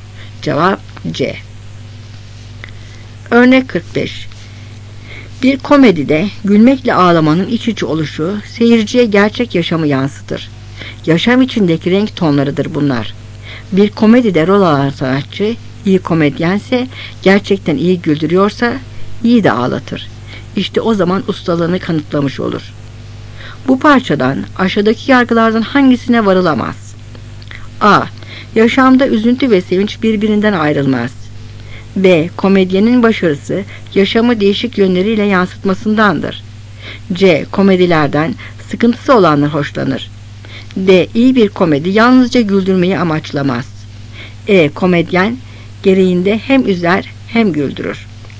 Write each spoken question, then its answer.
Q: Bu parçadan aşağıdaki yargılardan hangisine varılamaz?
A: Cevap C.